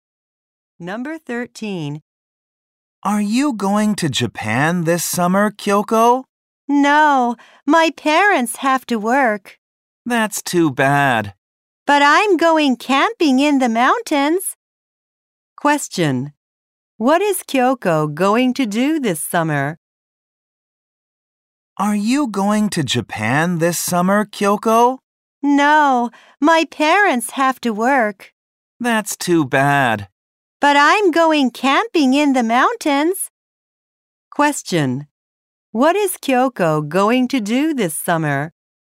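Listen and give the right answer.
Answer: Go camping in the mountains.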